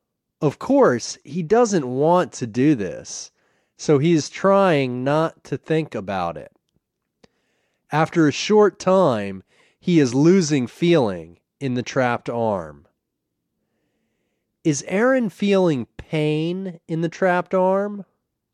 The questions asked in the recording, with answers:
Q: Is Aaron feeling pain in the trapped arm?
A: No, Aaron isn't feeling pain in his trapped arm.